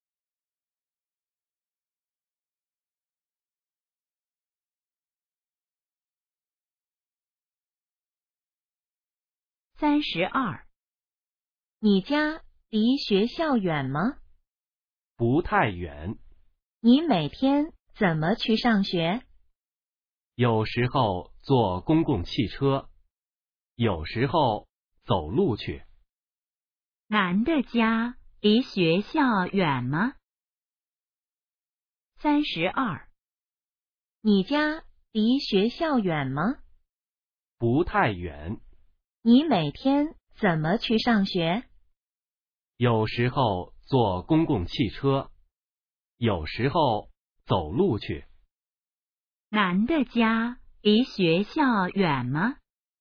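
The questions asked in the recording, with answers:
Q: 男的家离学校远吗?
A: 不太远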